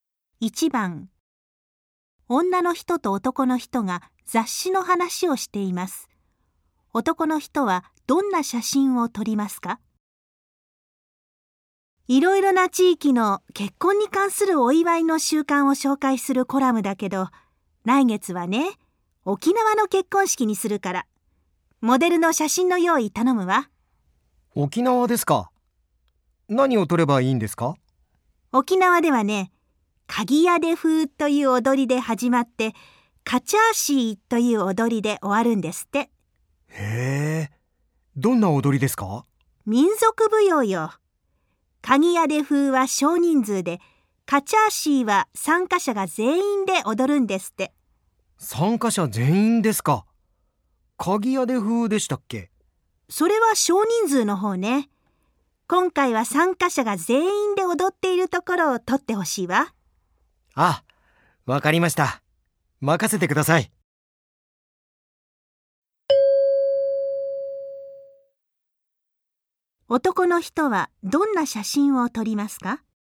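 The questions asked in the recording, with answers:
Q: 男の人はどんな写真を撮りますか?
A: 参加者全員でカチャーシーを踊っているところの写真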